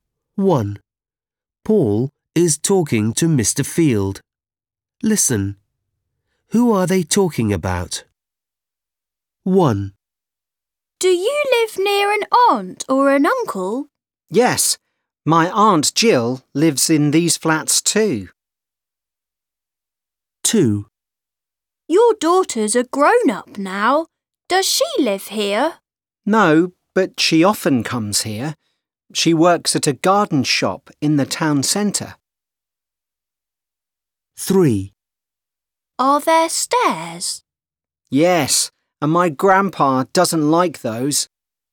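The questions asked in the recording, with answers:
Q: Who are they talking about?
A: Mr. Field's daughter

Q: Who are they talking about?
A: Grandpa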